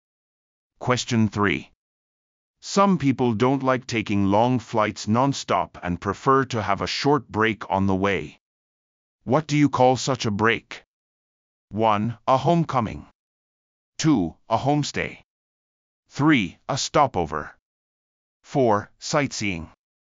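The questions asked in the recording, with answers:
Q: What do you call such a break?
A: 3: A stopover.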